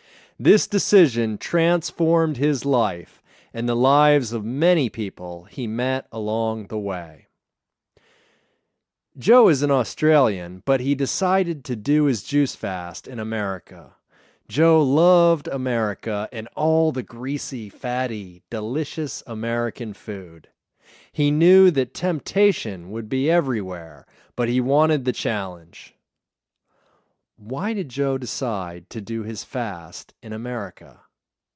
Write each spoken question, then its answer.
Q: Why did Joe decide to do his fast in America?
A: He decided to do his fast in America because he wanted a challenge.